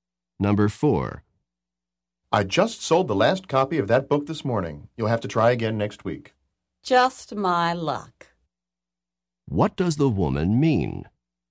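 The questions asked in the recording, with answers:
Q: What does the woman mean?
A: She is unlucky, as usual.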